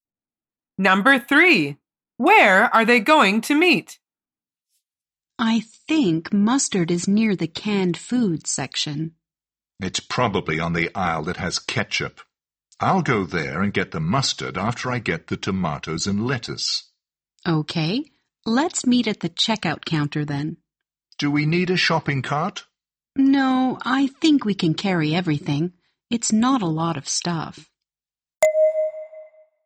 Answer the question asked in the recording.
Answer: The answer is at the checkout counter.